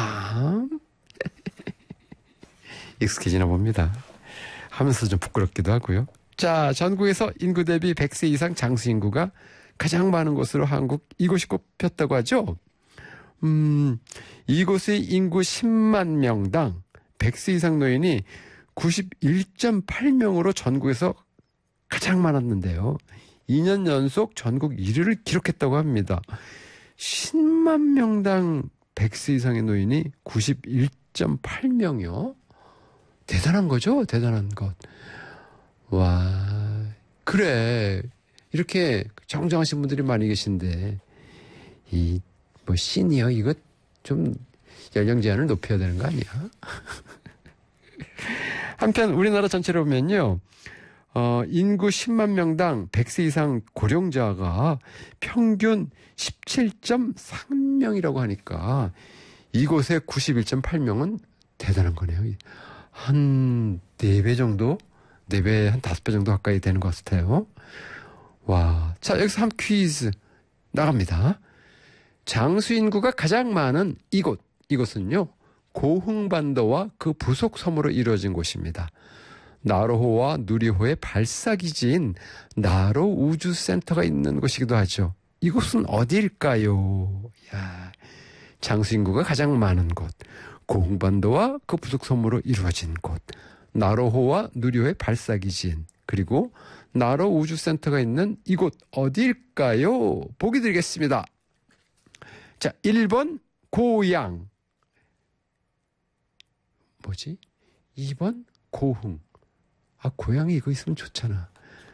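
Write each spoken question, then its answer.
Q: 이곳은 어디일까요?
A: 2: 고흥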